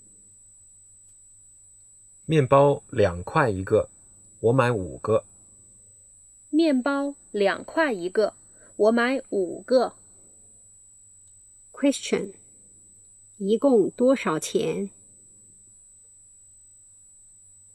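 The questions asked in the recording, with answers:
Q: 一共多少钱?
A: 十块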